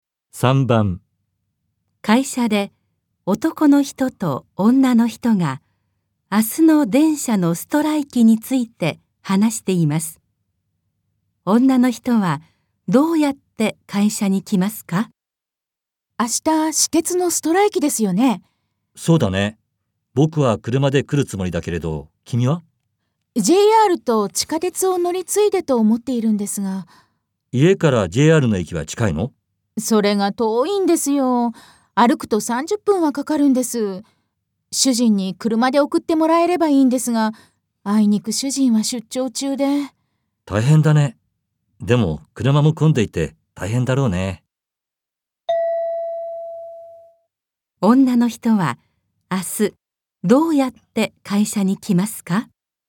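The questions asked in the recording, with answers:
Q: 女の人は明日どうやって会社に来ますか?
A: JRの駅まで歩いて、JRと地下鉄を乗り継いで来る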